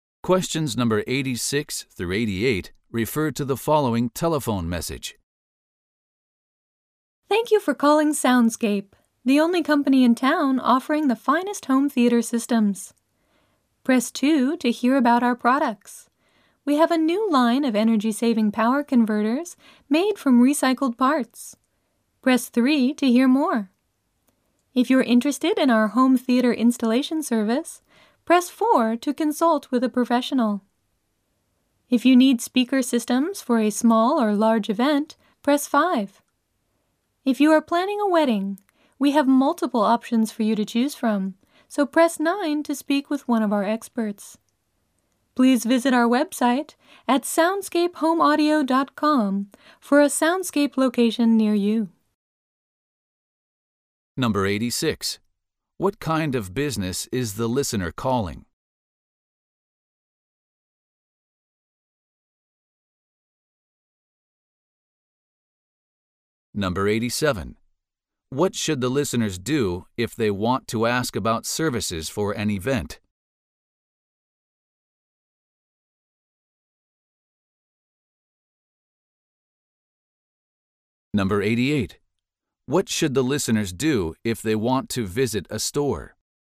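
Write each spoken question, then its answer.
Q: What kind of business is the listener calling?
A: A home theater / audio system company

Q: What should the listeners do if they want to ask about services for an event?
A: Press 5

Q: What should the listeners do if they want to visit a store?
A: Visit the website to find a location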